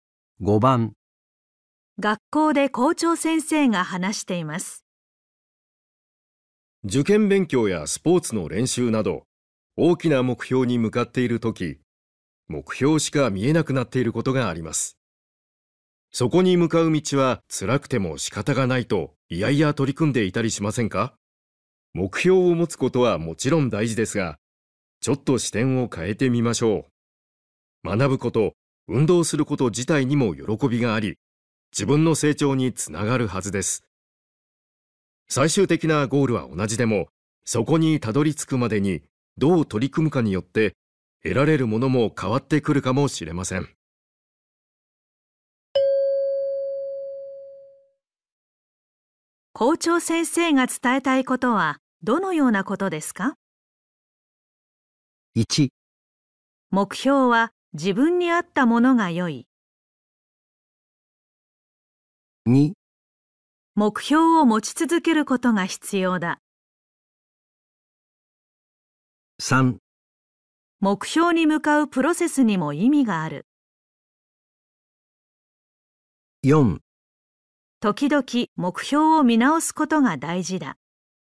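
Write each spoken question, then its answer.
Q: 校長先生が伝えたいことはどのようなことですか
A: 3: 目標に向かうプロセスにも意味がある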